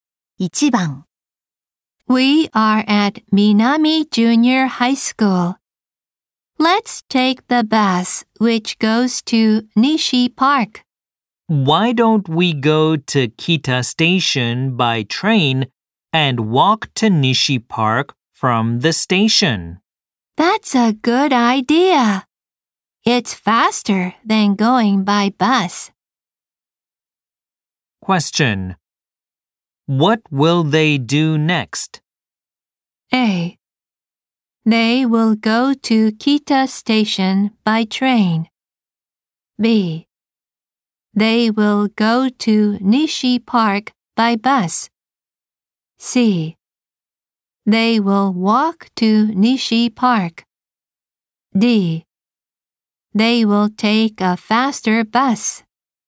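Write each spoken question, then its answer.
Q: What will they do next?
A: A: They will go to Kita Station by train.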